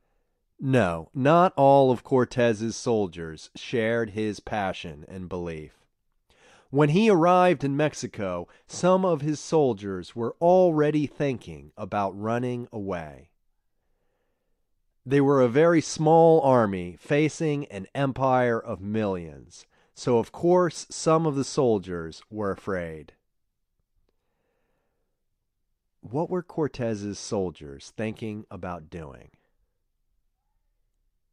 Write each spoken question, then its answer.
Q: What were Cortez's soldiers thinking about doing?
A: Cortez's soldiers were thinking about running away.